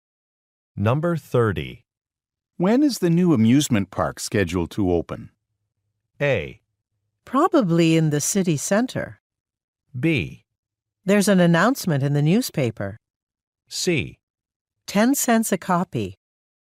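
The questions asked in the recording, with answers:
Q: When is the new amusement park scheduled to open?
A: B: There's an announcement in the newspaper.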